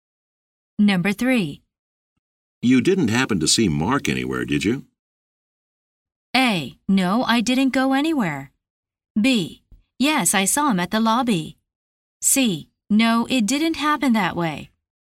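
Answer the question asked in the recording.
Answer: B: Yes, I saw him at the lobby.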